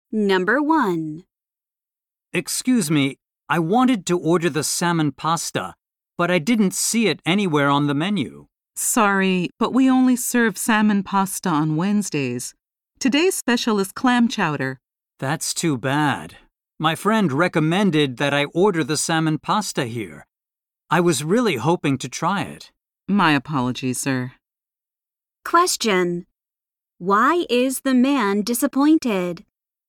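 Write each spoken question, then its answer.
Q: Why is the man disappointed?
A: The salmon pasta is only served on Wednesdays, so he can't order it today.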